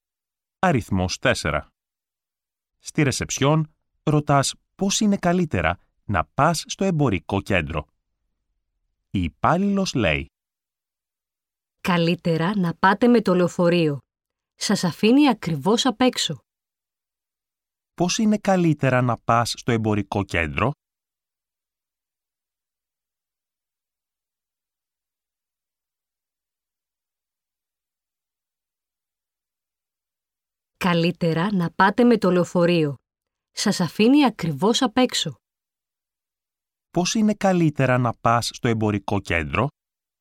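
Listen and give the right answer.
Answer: Με το λεωφορείο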